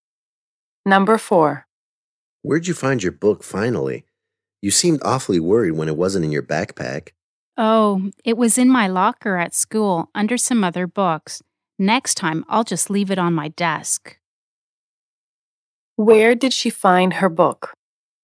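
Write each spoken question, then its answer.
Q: Where did she find her book?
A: In her locker at school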